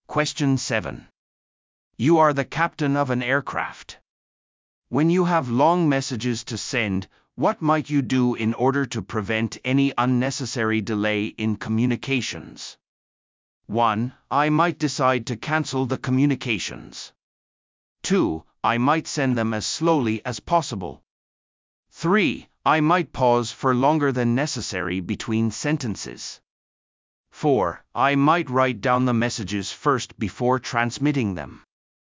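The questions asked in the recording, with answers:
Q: When you have long messages to send, what might you do in order to prevent any unnecessary delay in communications?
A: 4: I might write down the messages first before transmitting them.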